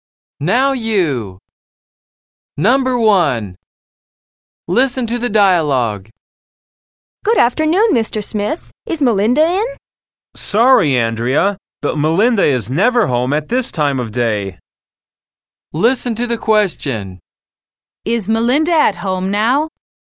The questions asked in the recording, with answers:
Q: Is Melinda at home now?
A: No, she isn't.